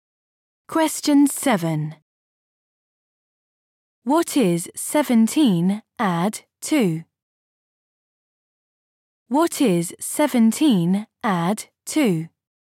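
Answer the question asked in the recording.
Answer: 19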